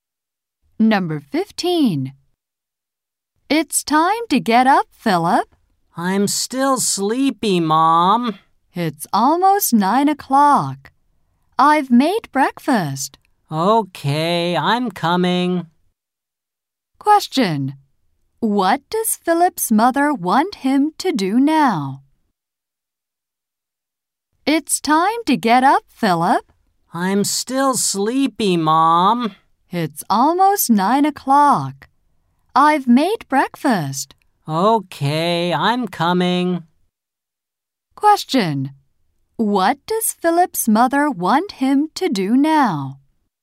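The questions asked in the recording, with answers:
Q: What does Philip's mother want him to do now?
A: Get up and eat breakfast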